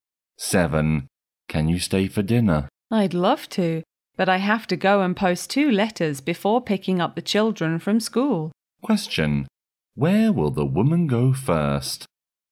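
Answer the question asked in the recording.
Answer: To the post office (to post 2 letters).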